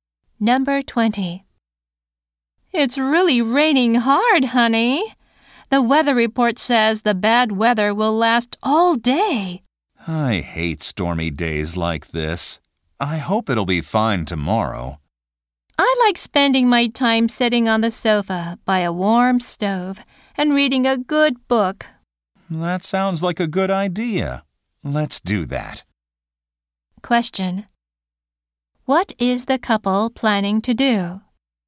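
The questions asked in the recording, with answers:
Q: What is the couple planning to do?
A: Sit on the sofa by the warm stove and read books.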